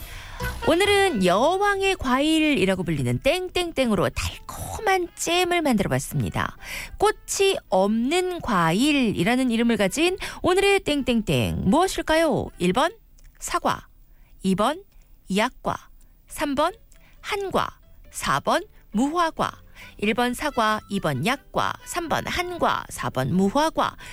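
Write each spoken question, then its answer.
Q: 꽃이 없는 과일이라는 이름을 가진 오늘의 땡땡땡 무엇일까요?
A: 4: 무화과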